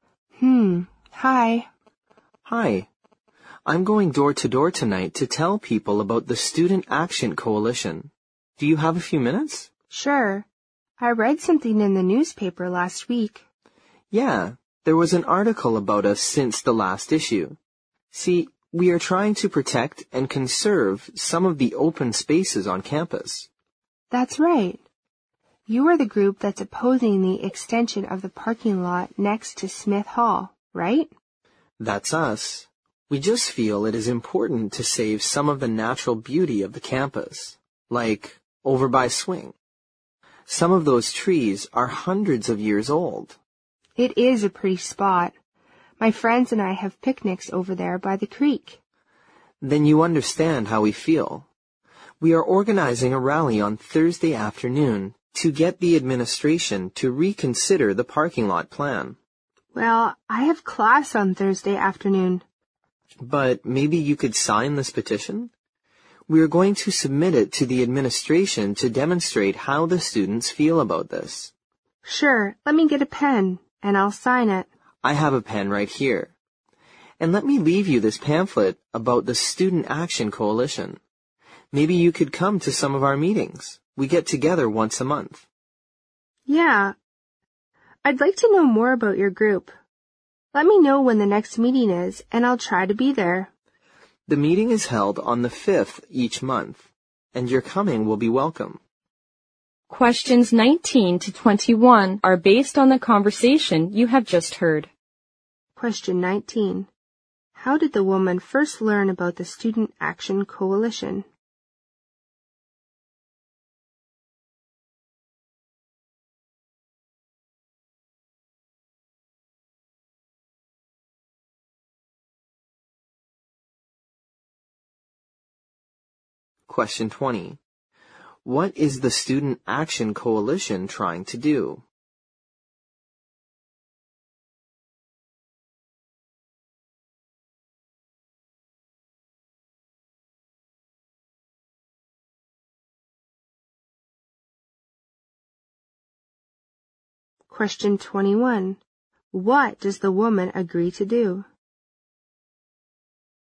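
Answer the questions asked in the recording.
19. From an article in the newspaper
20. Protect and conserve open spaces on campus
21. Sign the petition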